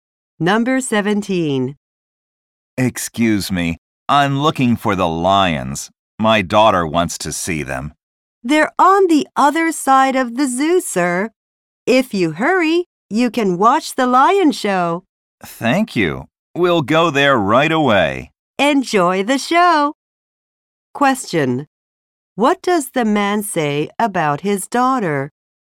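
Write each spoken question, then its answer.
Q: What does the man say about his daughter?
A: She wants to see the lions.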